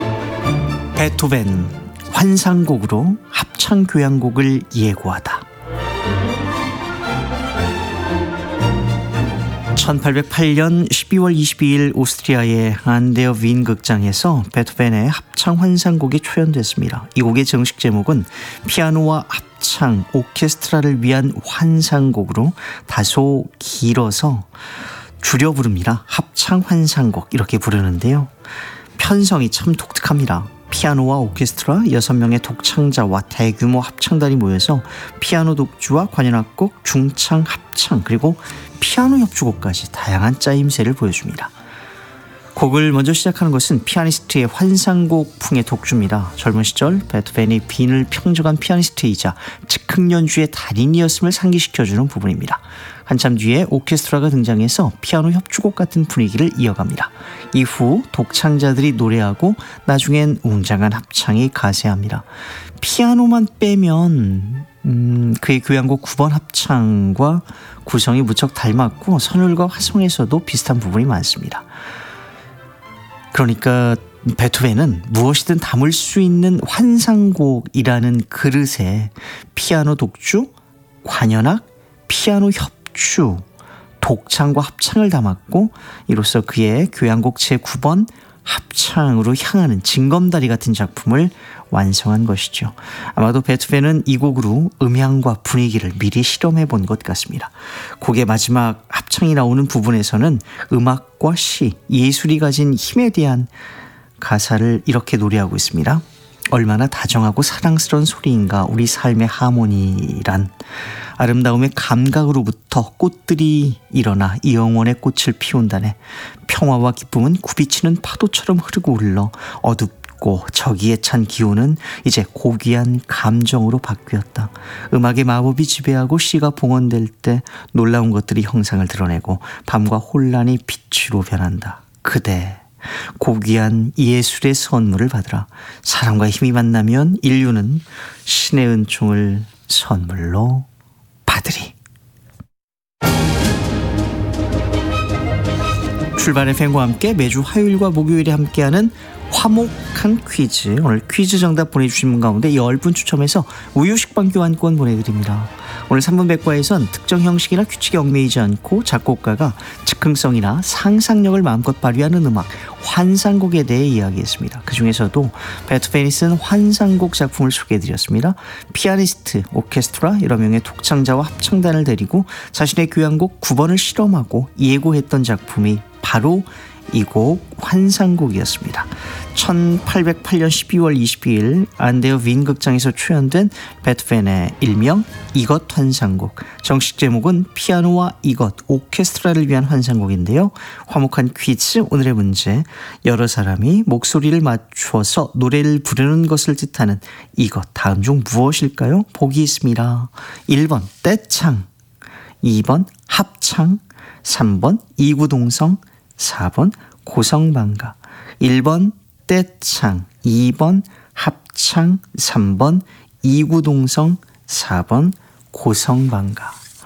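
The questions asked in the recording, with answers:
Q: 여러 사람이 목소리를 맞춰서 노래를 부르는 것을 뜻하는 이것 다음 중 무엇일까요?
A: 2번: 합창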